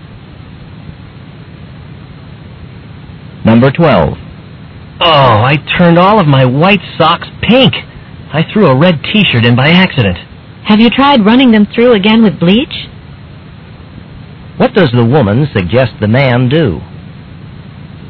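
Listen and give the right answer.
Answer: Wash the socks again with bleach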